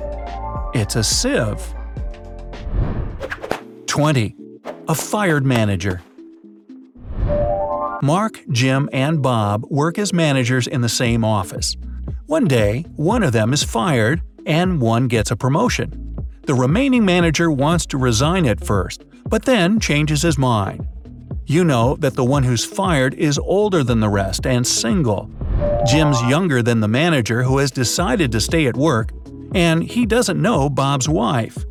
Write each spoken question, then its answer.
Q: Who's fired?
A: It means that Mark has been fired